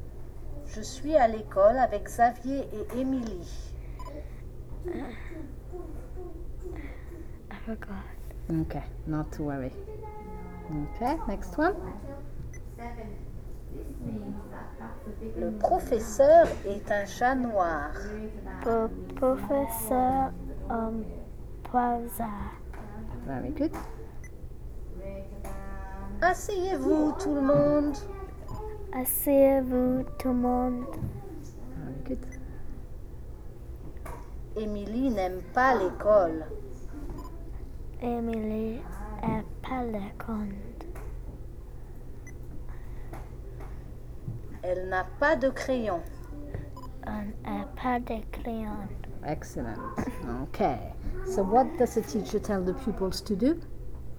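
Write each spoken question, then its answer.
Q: So what does the teacher tell the pupils to do?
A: Sit down, everyone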